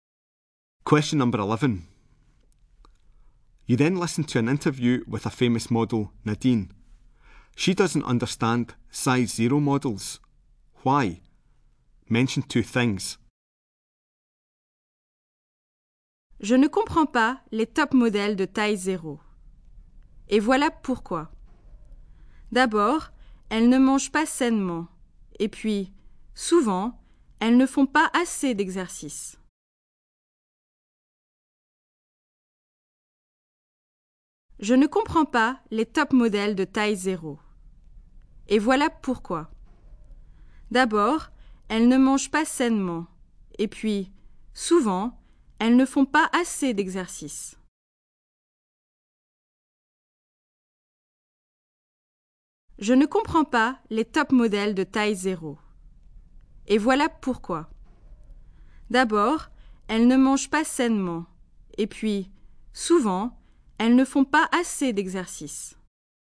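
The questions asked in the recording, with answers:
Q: Why? Mention two things.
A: They don't eat healthily; they don't do enough exercise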